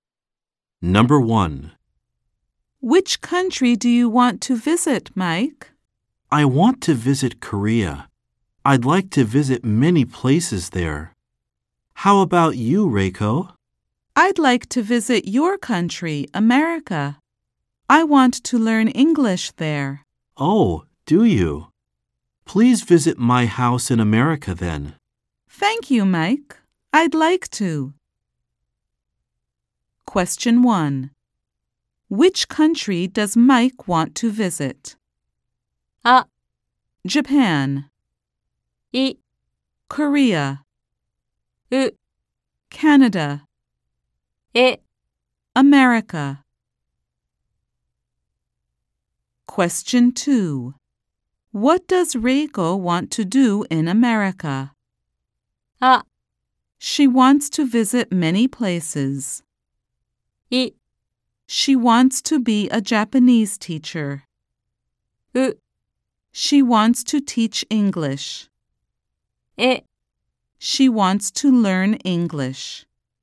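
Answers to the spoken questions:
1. い: Korea
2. え: She wants to learn English.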